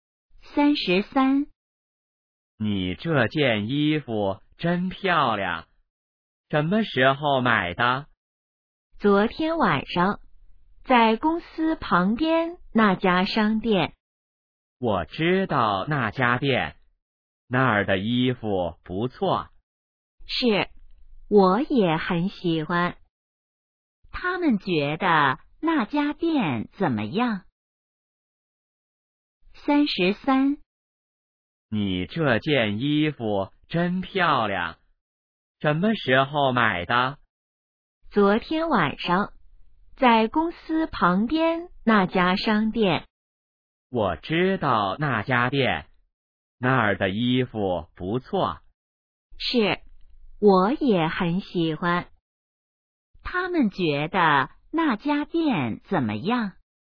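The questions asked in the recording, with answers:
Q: 他们觉得那家店怎么样?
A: 衣服不错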